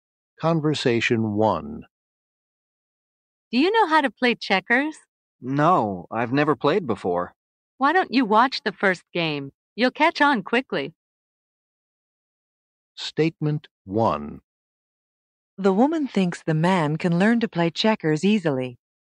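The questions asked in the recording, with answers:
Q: The woman thinks the man can learn to play checkers easily.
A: True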